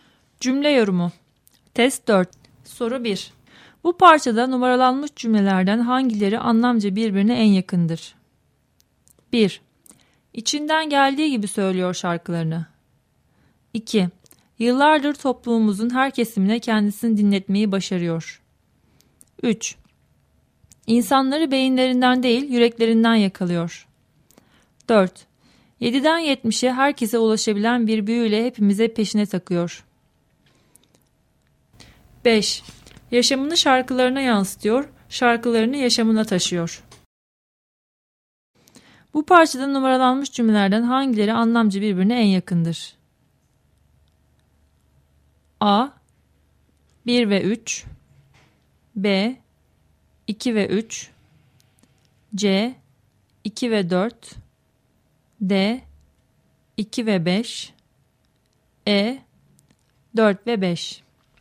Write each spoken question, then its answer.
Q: Bu parçada numaralanmış cümlelerden hangileri anlamca birbirine en yakındır?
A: Doğru cevap C şıkkı.